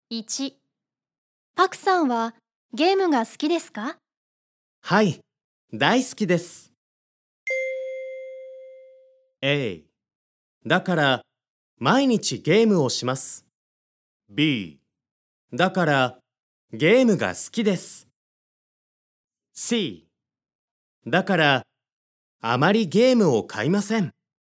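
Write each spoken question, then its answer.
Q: パクさんはゲームが好きですか?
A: A: だから毎日ゲームをします。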